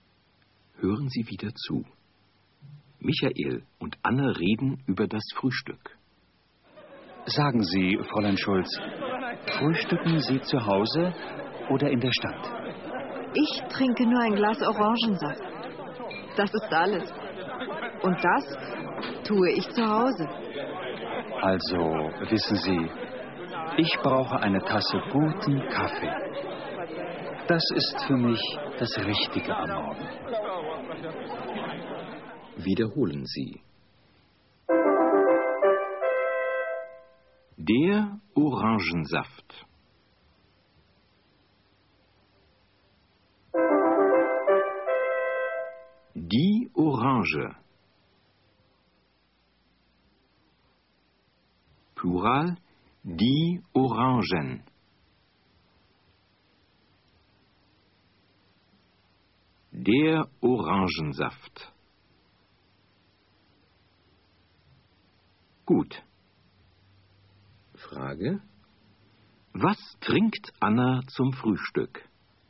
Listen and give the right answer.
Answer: Sie trinkt ein Glas Orangensaft zum Frühstück.